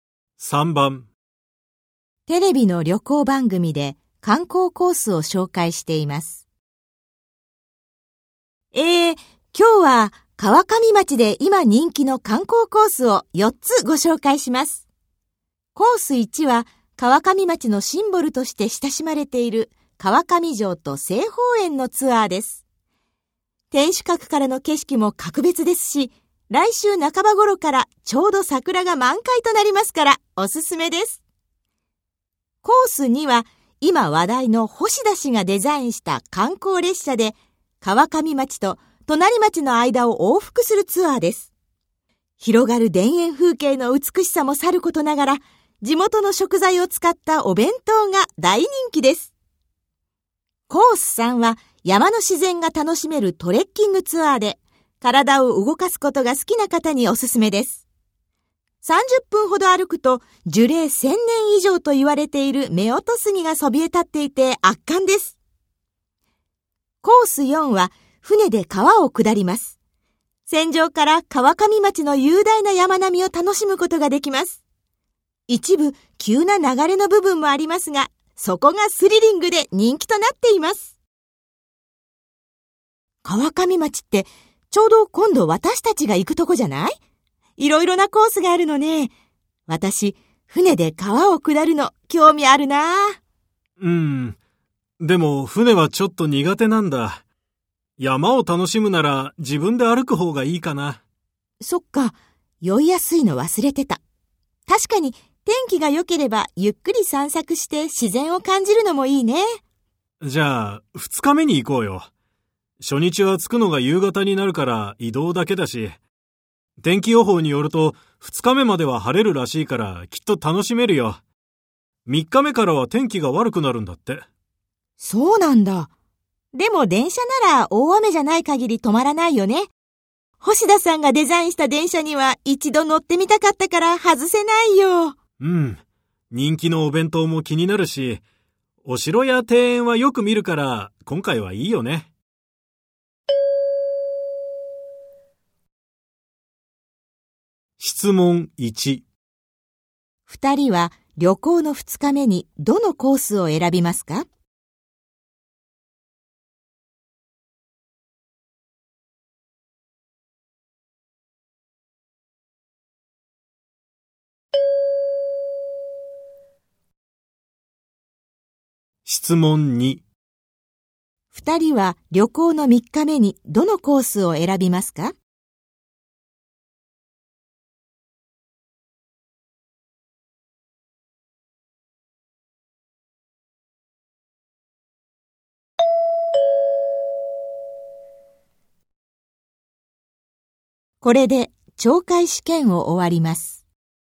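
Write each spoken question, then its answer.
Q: 二人は旅行の2日目にどのコースを選びますか?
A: コース3(山のトレッキングツアー)

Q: 二人は旅行の3日目にどのコースを選びますか?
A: コース2(観光列車のツアー)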